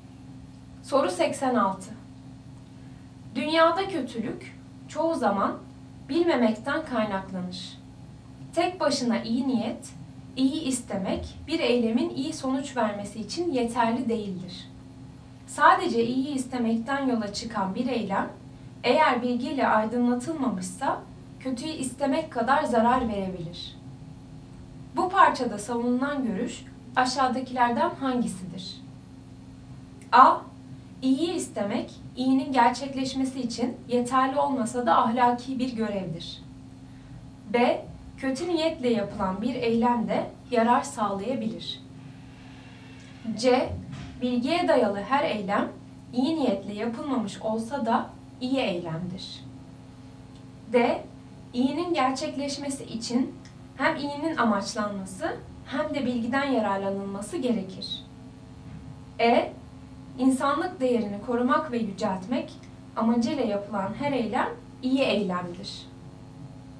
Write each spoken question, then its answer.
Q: Bu parçada savunulan görüş aşağıdakilerden hangisidir?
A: Doğru cevap D. İyinin gerçekleşmesi için hem iyinin amaçlanması hem de bilgiden yararlanılması gerekir.